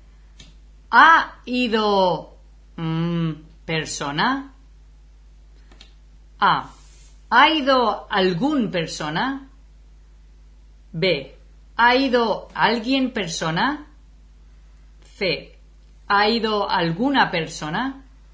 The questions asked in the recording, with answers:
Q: Ha ido...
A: Ok. So, yo diría, sí, alguna persona.